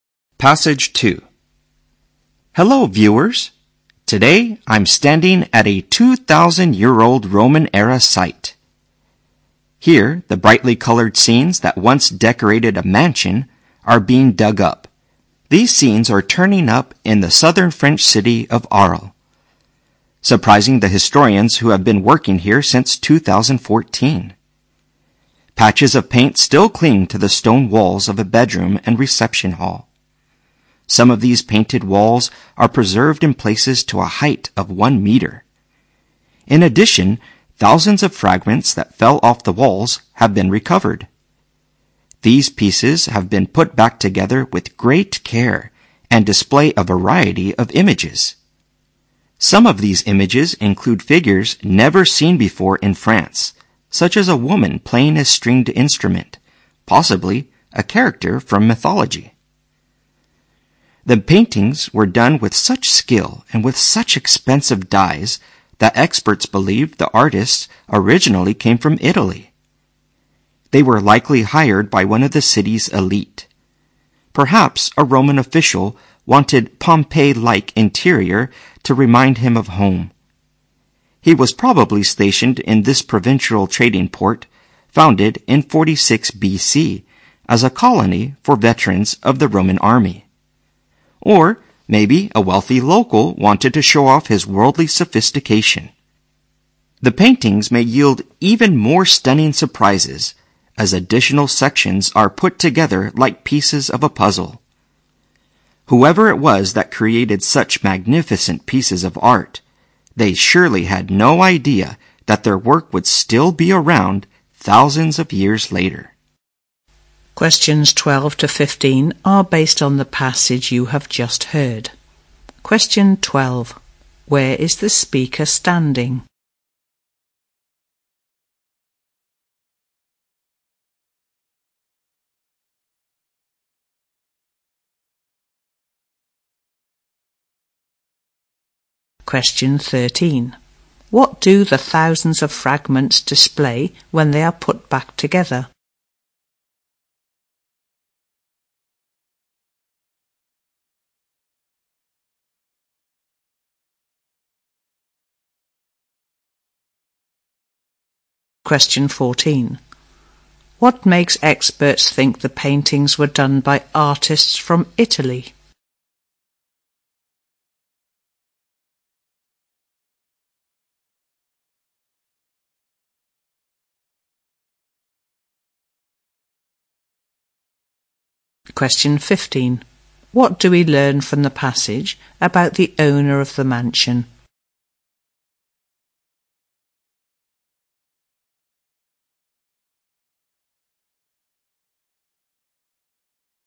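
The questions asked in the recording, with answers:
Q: Where is the speaker standing?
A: At a 2,000-year-old Roman-era site in Arles, France

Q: What do the thousands of fragments display when they are put back together?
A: A variety of images

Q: What makes experts think the paintings were done by artists from Italy?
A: The great skill and expensive dyes used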